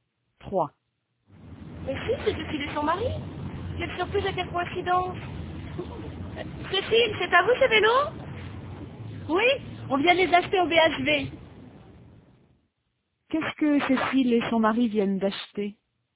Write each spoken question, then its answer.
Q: Qu'est-ce que Cécile et son mari viennent d'acheter?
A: Des vélos.